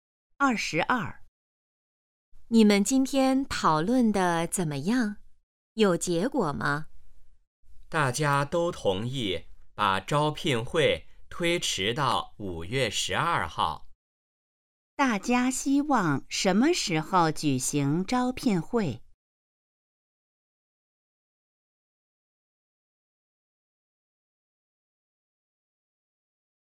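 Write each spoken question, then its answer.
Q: 大家希望什么时候举行招聘会?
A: 5月12号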